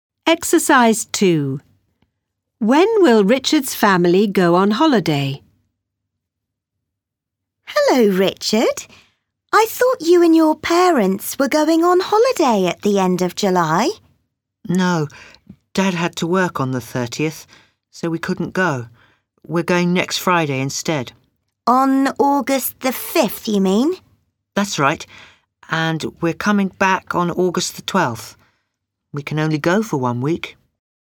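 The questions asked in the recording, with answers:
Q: When will Richard's family go on holiday?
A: On August the 5th (next Friday)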